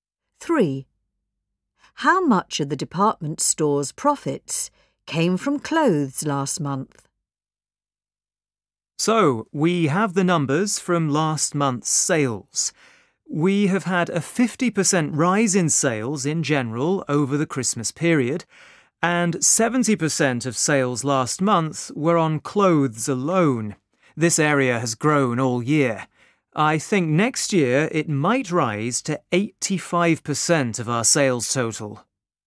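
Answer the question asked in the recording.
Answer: 70%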